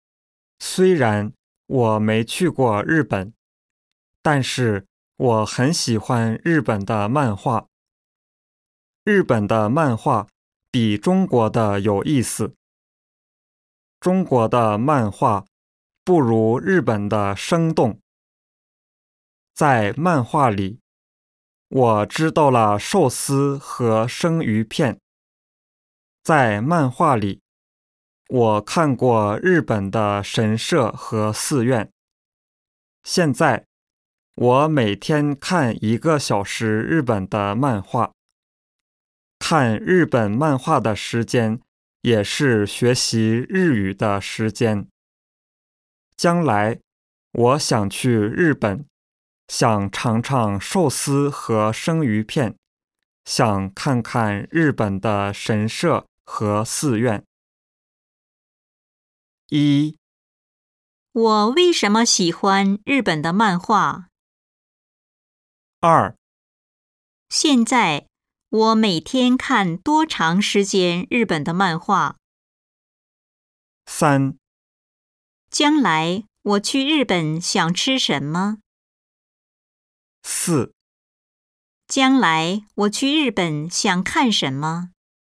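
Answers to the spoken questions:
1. 因为日本的漫画比中国的有意思,更生动
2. 一个小时
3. 寿司和生鱼片
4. 日本的神社和寺院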